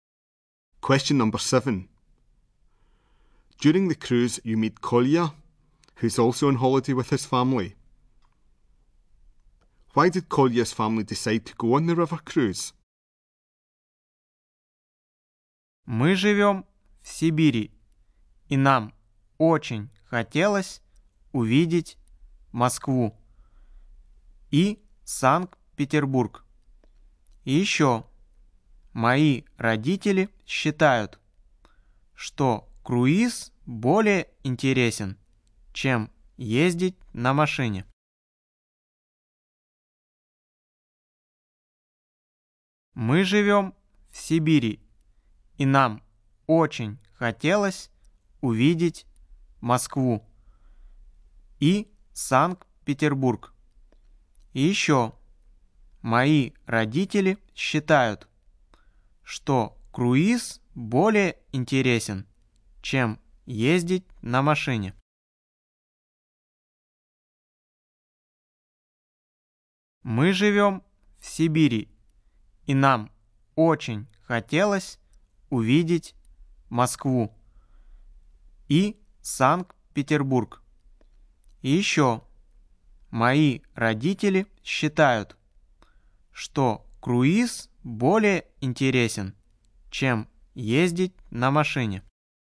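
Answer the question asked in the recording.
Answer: They wanted to see Moscow and St Petersburg, and his parents think a cruise is more interesting than travelling by car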